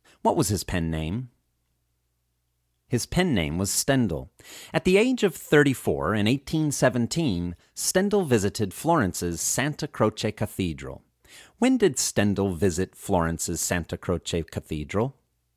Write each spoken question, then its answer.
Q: When did Stendhal visit Florence's Santa Croce Cathedral?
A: Stendhal visited Florence's Santa Croce Cathedral at the age of 34 in 1817.